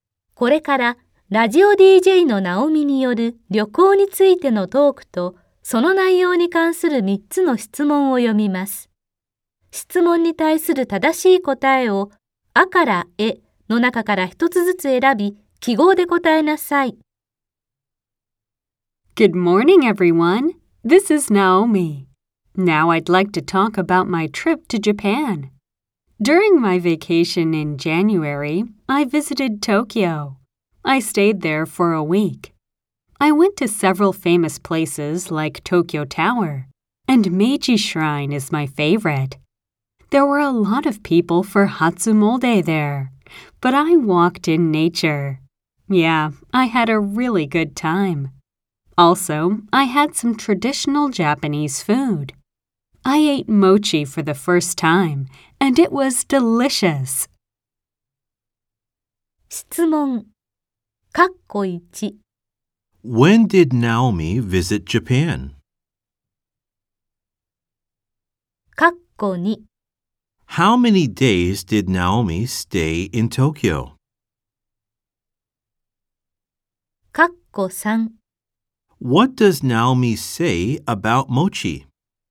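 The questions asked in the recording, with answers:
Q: When did Naomi visit Japan?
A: In January (during her vacation)

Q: How many days did Naomi stay in Tokyo?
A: Seven days (a week)

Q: What does Naomi say about mochi?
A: She ate it for the first time and it was delicious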